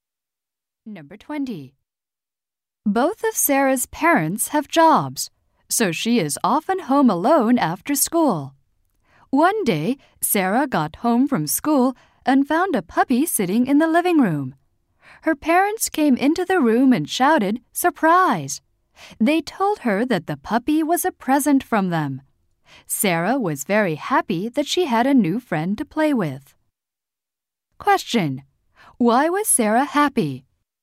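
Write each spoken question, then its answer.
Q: Why was Sarah happy?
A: Her parents gave her a puppy.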